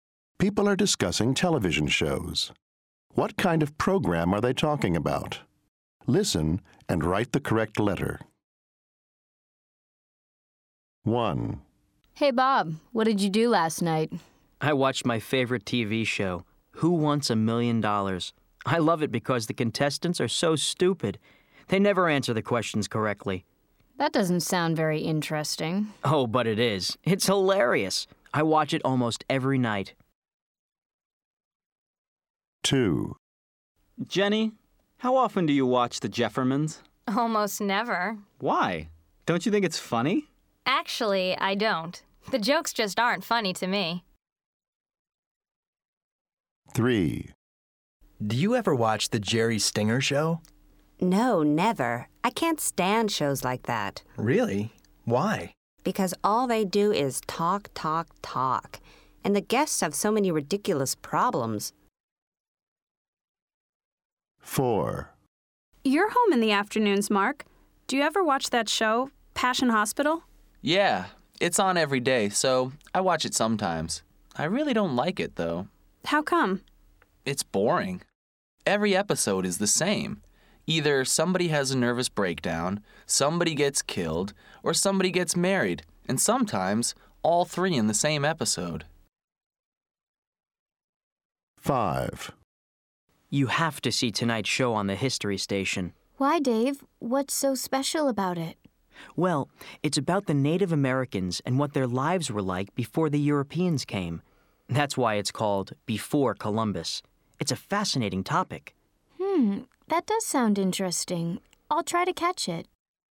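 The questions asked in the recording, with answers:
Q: What kind of program are they talking about?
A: a game show

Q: What kind of program are they talking about?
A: a sitcom (comedy)

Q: What kind of program are they talking about?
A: a talk show

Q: What kind of program are they talking about?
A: a soap opera

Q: What kind of program are they talking about?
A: a documentary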